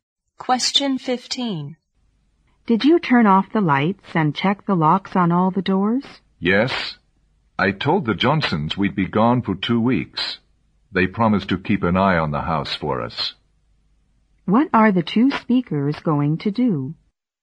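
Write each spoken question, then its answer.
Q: What are the two speakers going to do?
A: Go away on a two-week trip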